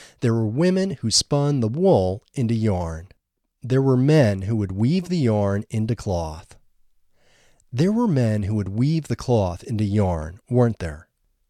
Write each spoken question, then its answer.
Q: There were men who would weave the cloth into yarn, weren't there?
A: No, there weren't men who would weave the cloth into yarn.